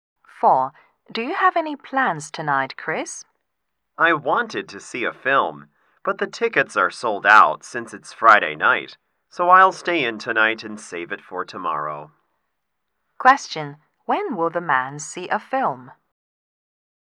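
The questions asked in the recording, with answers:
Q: When will the man see a film?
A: Tomorrow (Saturday night)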